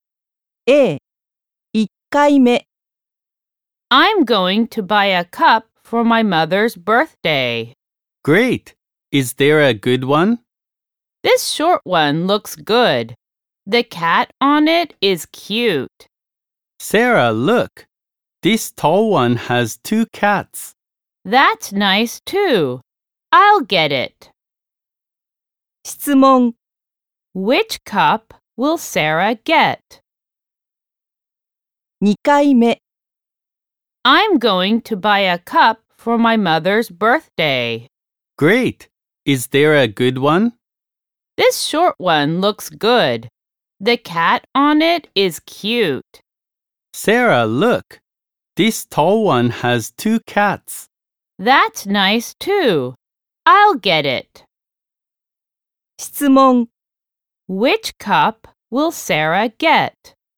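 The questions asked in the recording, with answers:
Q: Which cup will Sarah get?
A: The tall cup with two cats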